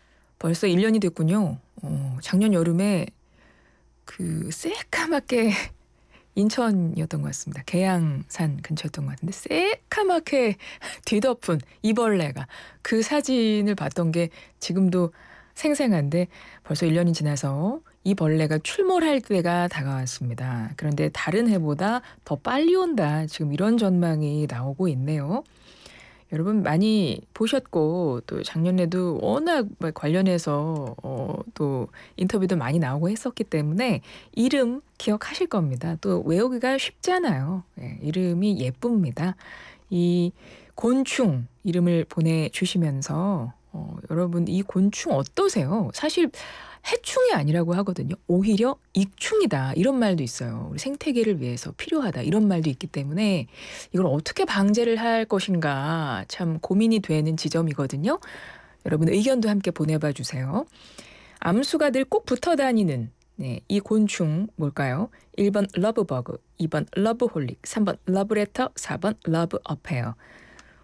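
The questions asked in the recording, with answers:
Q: 암수가 늘꼭 붙어 다니는 네, 이 곤충 뭘까요?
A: 1번: 러브버그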